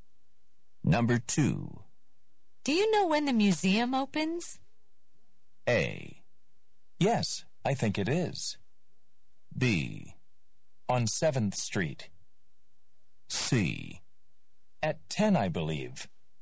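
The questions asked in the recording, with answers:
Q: Do you know when the museum opens?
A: C: At 10, I believe.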